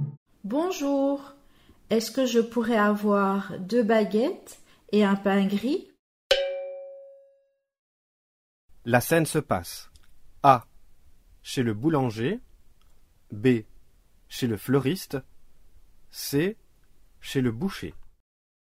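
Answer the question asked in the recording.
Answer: A: Chez le boulanger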